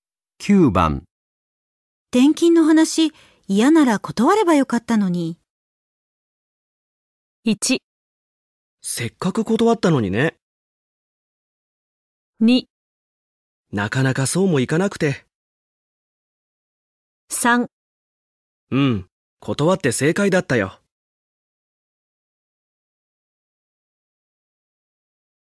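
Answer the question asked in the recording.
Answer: 2: なかなかそうもいかなくて。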